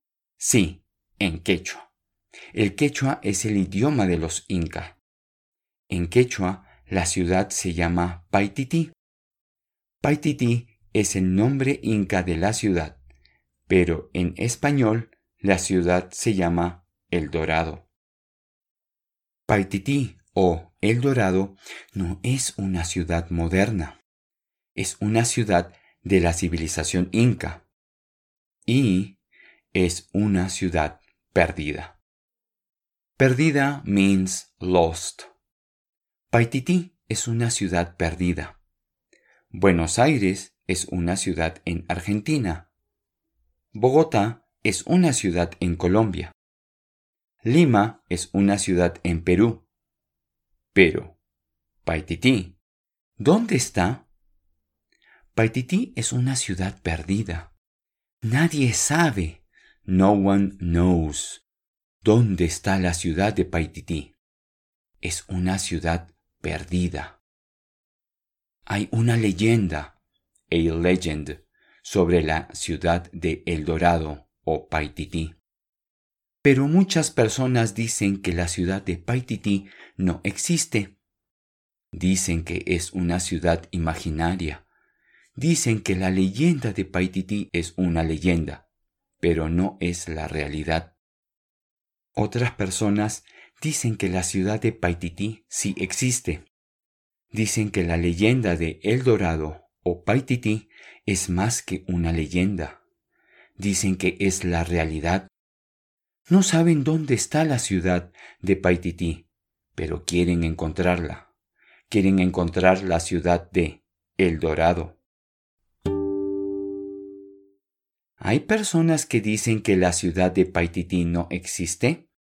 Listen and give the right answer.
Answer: Sí, hay personas que dicen que no existe.